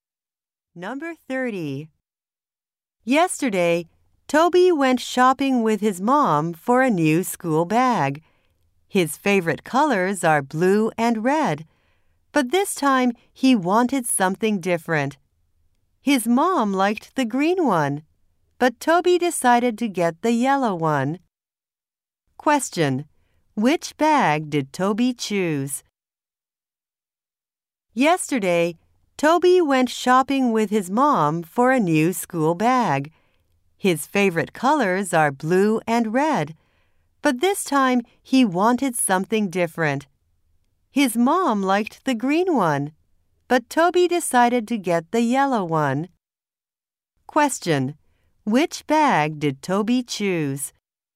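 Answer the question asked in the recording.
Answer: The yellow one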